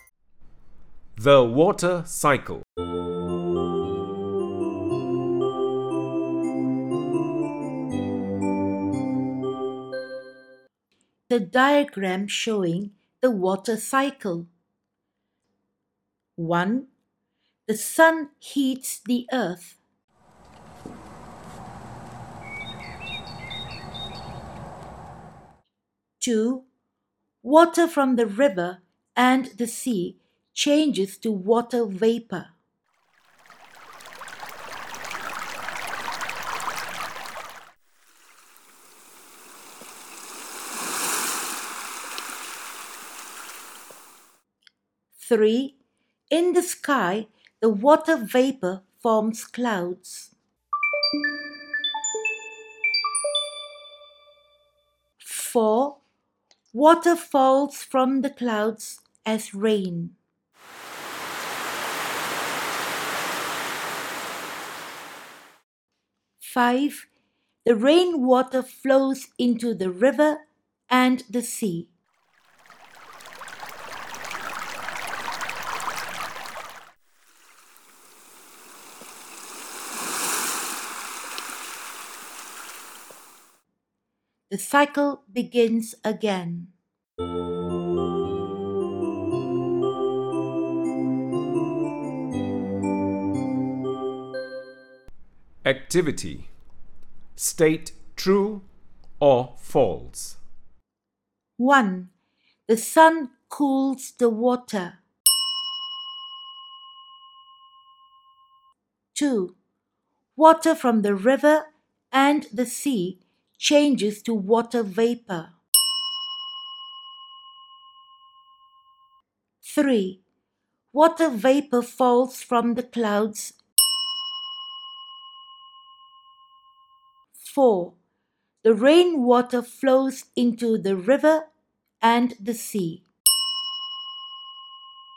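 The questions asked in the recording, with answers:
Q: The sun cools the water.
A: False

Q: Water from the river and the sea changes to water vapor.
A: True

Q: Water vapor falls from the clouds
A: False

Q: The rainwater flows into the river and the sea.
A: True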